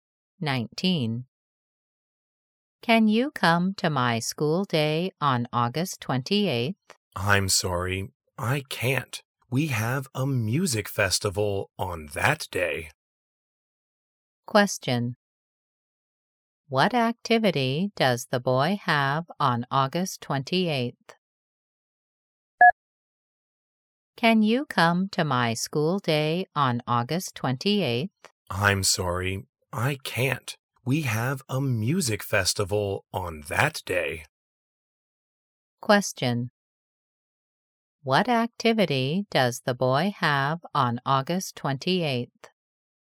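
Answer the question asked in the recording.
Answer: A music festival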